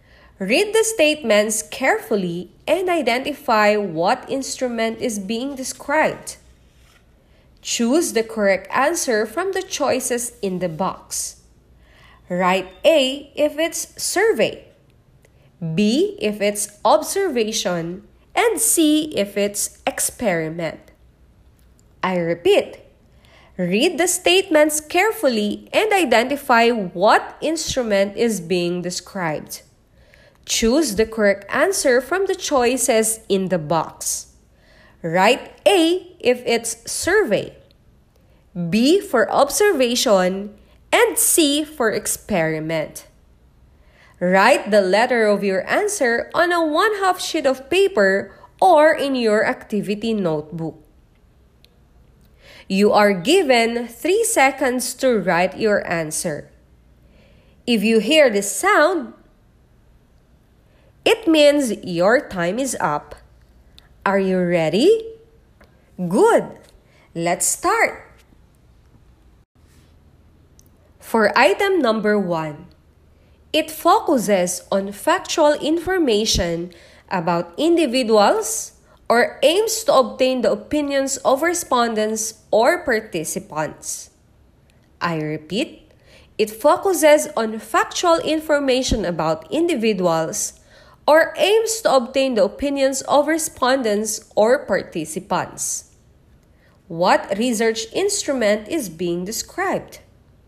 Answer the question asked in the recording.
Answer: It's letter A, survey.